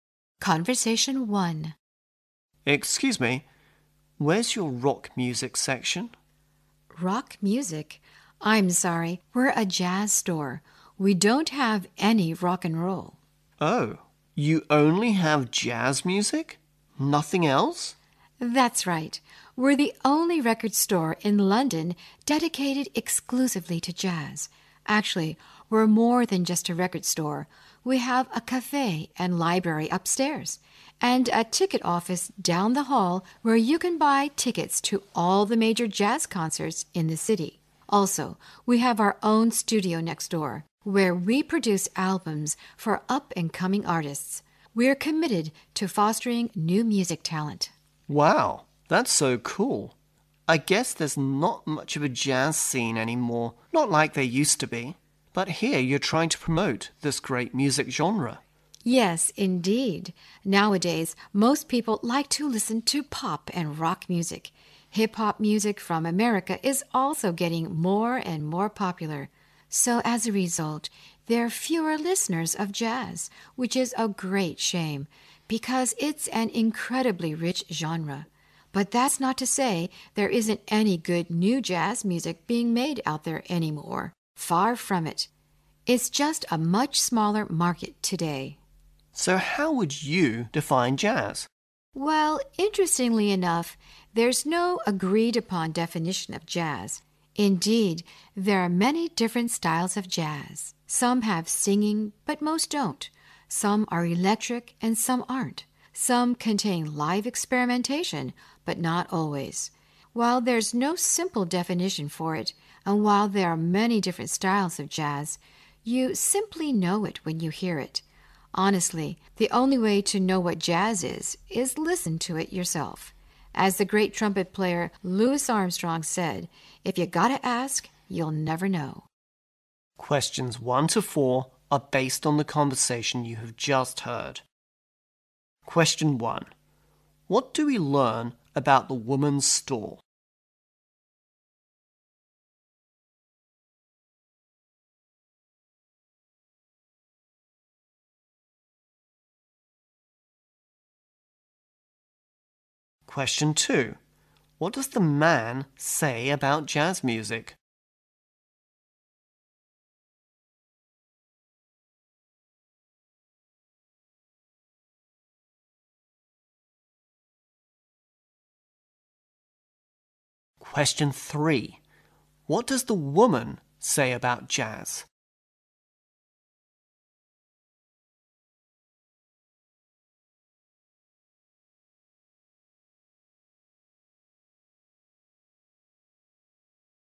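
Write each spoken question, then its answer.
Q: What do we learn about the woman's store?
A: It sells only jazz music and also has a cafe, library, ticket office and studio.

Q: What does the man say about jazz music?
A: There isn't much of a jazz scene anymore.

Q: What does the woman say about jazz?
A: There is no agreed-upon definition of it.

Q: What should you do to appreciate different styles of jazz according to the woman?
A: Listen to it yourself.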